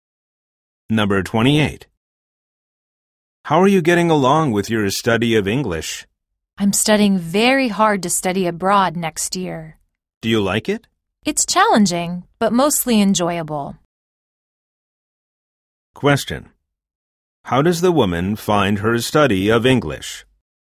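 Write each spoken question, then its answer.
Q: How does the woman find her study of English?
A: Challenging, but mostly enjoyable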